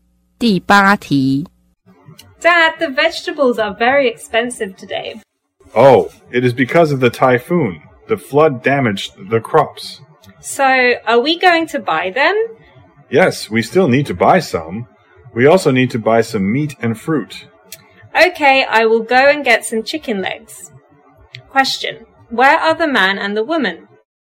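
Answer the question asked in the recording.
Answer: At a market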